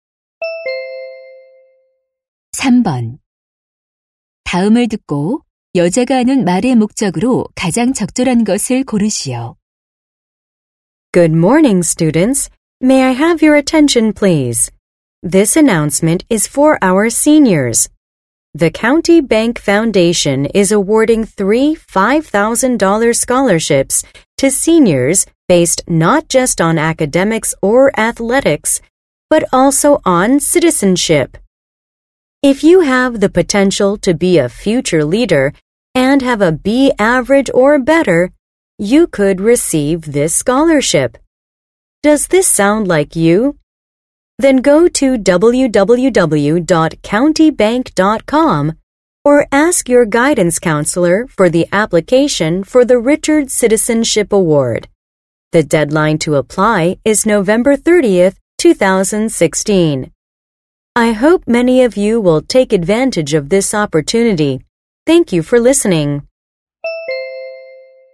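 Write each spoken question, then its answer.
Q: 다음을 듣고 여자가 하는 말의 목적으로 가장 적절한 것을 고르시오.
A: 장학금 신청을 안내하려고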